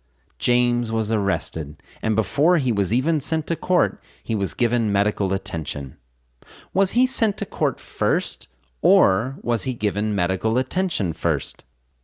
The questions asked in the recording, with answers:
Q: Was he sent to court first, or was he given medical attention first?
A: He was given medical attention first.